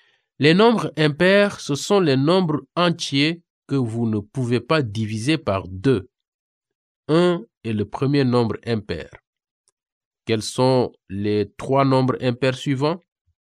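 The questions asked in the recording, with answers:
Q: Quels sont les trois nombres impairs suivants?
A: 3, 5 et 7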